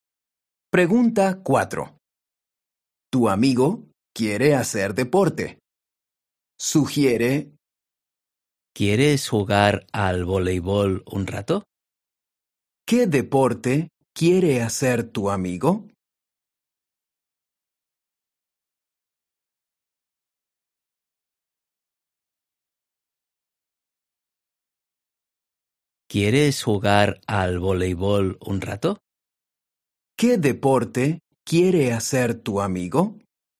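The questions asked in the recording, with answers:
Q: ¿Qué deporte quiere hacer tu amigo?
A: Voleibol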